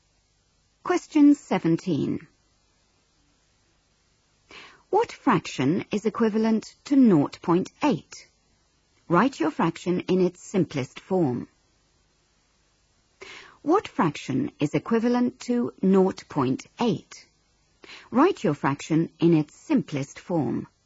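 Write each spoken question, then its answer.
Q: What fraction is equivalent to 0.8?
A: 4/5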